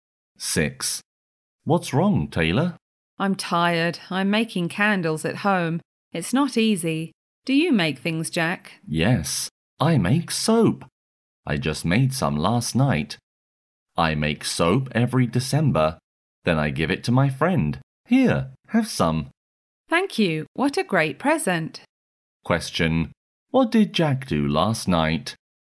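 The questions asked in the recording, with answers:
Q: What did Jack do last night?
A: He made soap.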